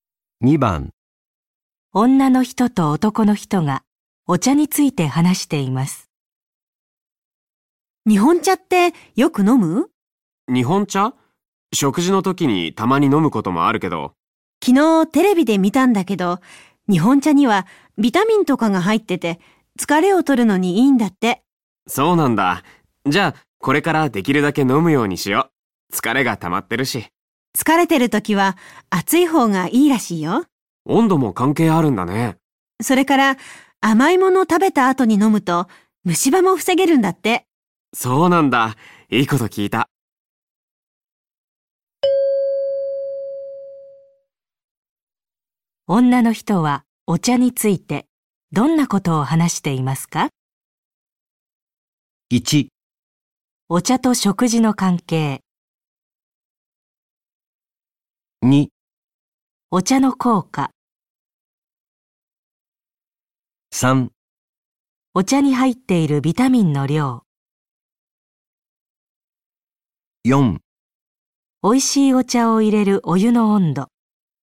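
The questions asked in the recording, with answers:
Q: 女の人はお茶についてどんなことを話していますか?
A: 2: お茶の効果。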